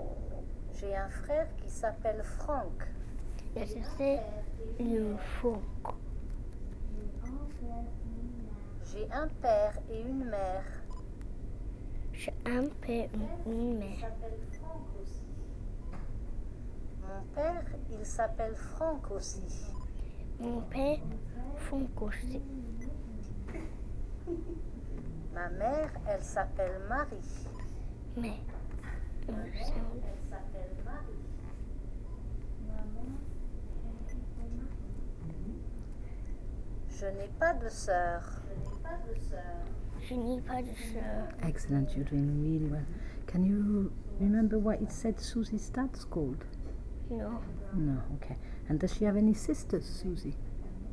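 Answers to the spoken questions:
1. Franck
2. No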